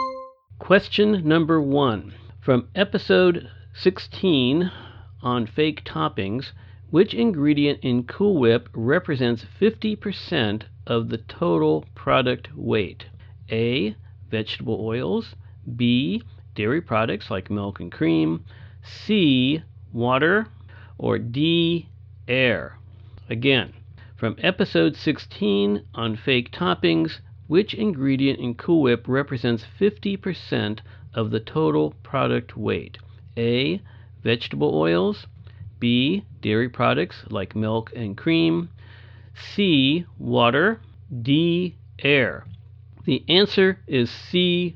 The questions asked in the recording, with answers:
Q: From episode 16 on fake toppings, which ingredient in Cool Whip represents 50% of the total product weight?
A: The answer is C.